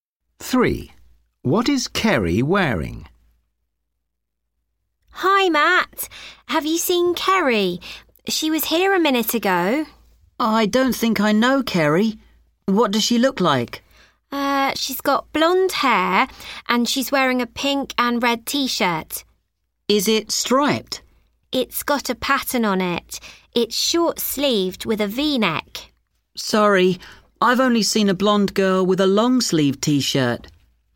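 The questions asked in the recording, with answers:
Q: What is Kerry wearing?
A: a pink and red patterned short-sleeved V-neck T-shirt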